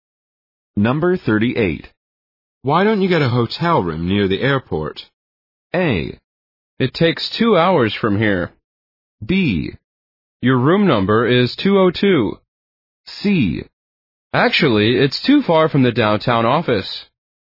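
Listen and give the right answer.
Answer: C: Actually, it's too far from the downtown office.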